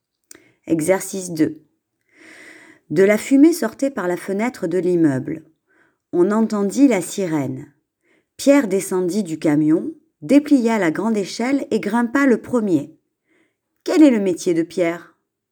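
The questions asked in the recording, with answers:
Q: Quel est le métier de Pierre ?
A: Pompier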